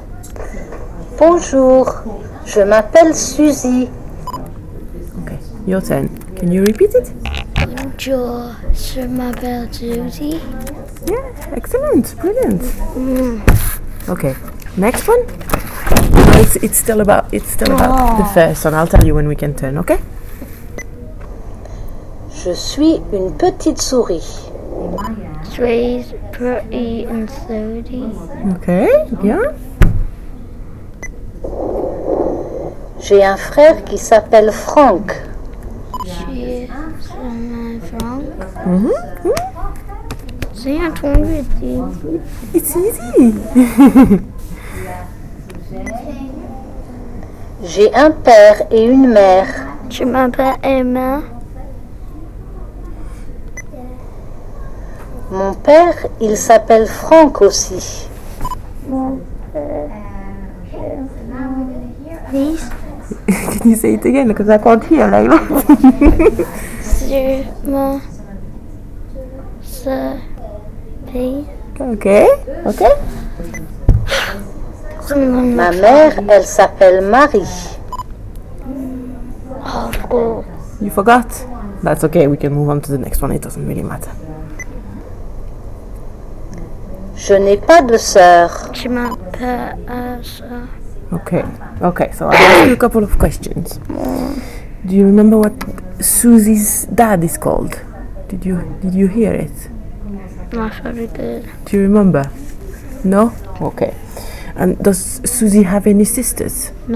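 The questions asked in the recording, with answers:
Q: Do you remember what Susie's dad is called?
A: Franck

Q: And does Susie have any sisters?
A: No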